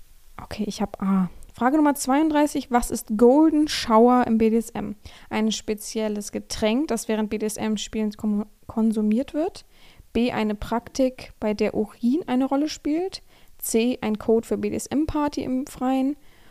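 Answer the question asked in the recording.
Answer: B: Eine Praktik, bei der Urin eine Rolle spielt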